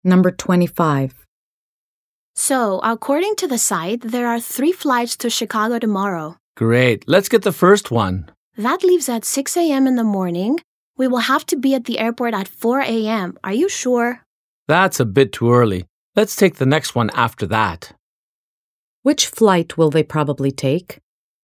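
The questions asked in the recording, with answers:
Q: Which flight will they probably take?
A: The second flight (the one after the 6 a.m. flight)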